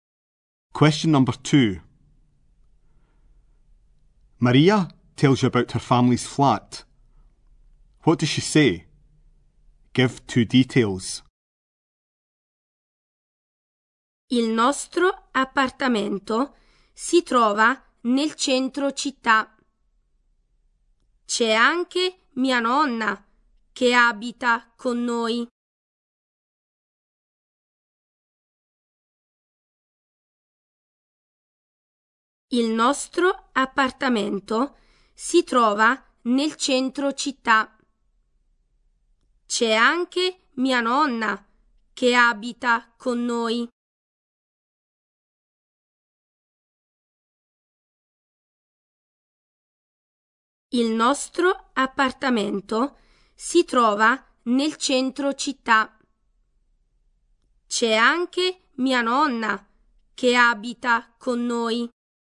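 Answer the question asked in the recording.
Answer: The flat is in the city centre; her grandmother lives with them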